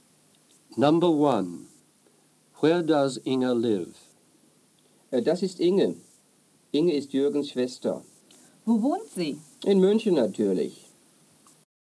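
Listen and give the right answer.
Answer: In Munich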